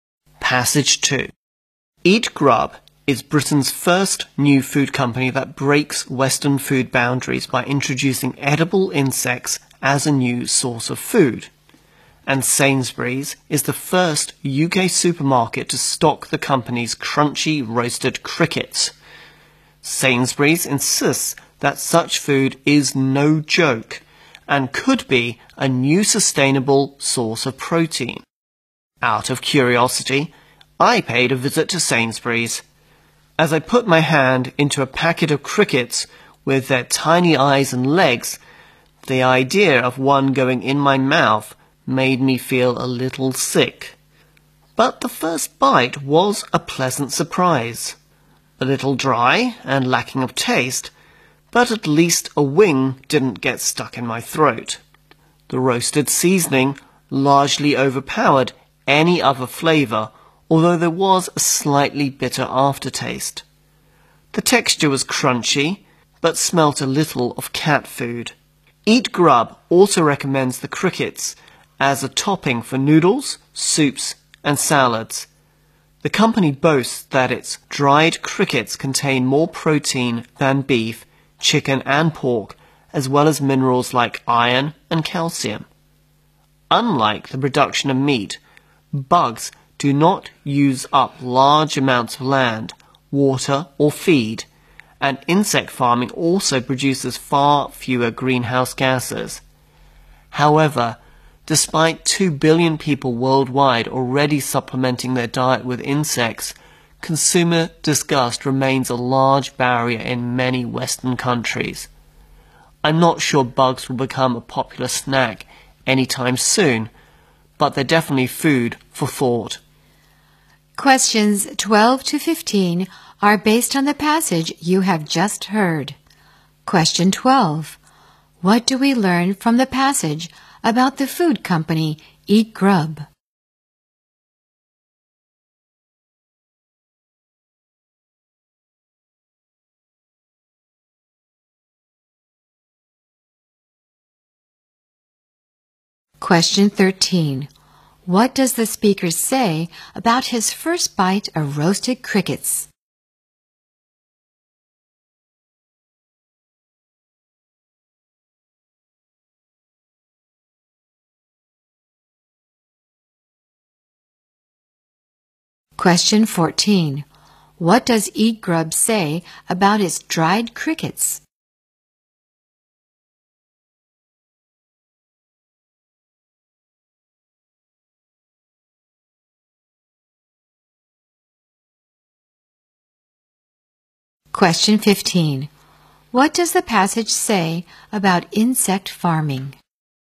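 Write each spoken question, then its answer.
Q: What do we learn from the passage about the food company Eat Grub?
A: It is Britain's first company to introduce edible insects as food.

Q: What does the speaker say about his first bite of roasted crickets?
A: It was a pleasant surprise.

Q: What does Eat Grub say about its dried crickets?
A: They contain more protein than beef, chicken and pork.

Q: What does the passage say about insect farming?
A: It produces far fewer greenhouse gases and uses less land, water and feed.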